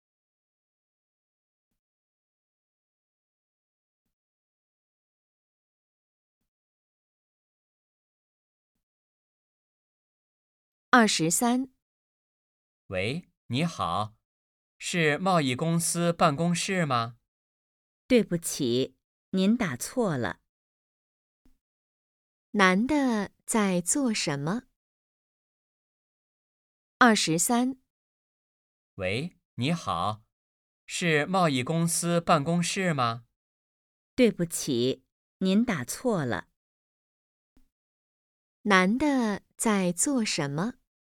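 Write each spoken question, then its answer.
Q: 男的在做什么?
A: 打电话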